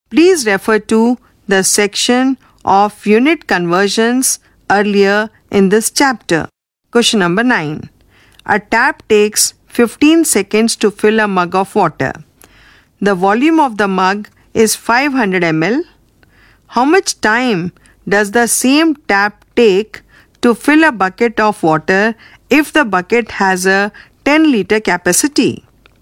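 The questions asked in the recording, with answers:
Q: How much time does the same tap take to fill a bucket of water if the bucket has a 10 liter capacity?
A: 300 seconds (5 minutes)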